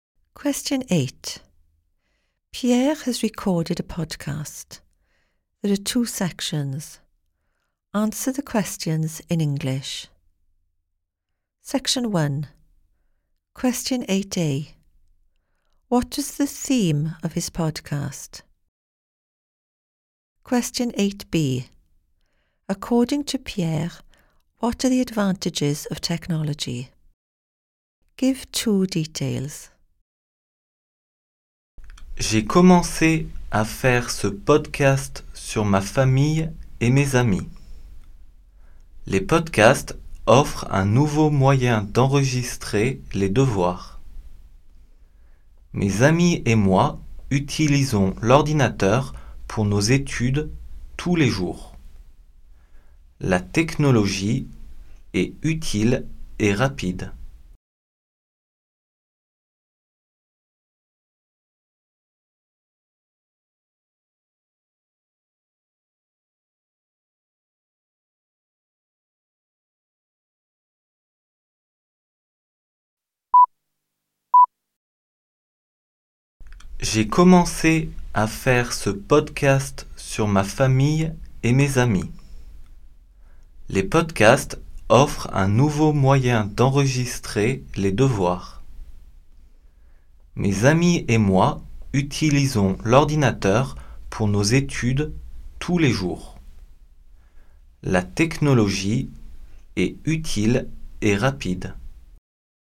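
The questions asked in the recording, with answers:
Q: What is the theme of his podcast?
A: His family and friends

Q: According to Pierre, what are the advantages of technology?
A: Useful and fast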